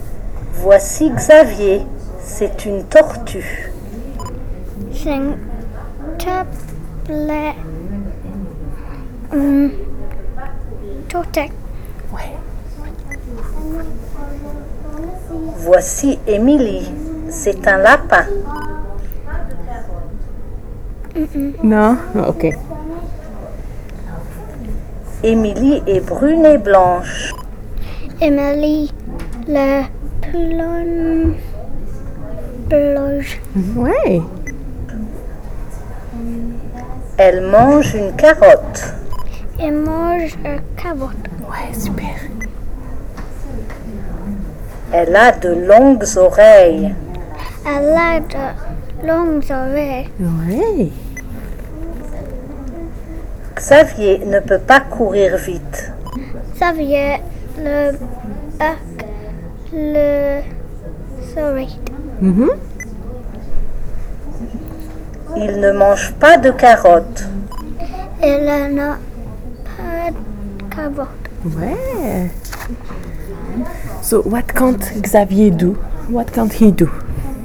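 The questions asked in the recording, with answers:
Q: So what can't Xavier do?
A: Run fast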